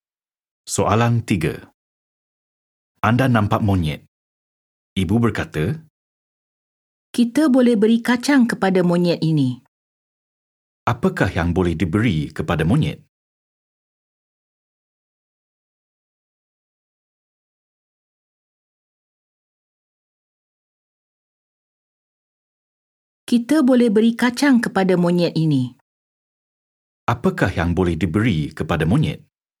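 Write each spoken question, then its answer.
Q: Apakah yang boleh diberi kepada monyet?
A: Kacang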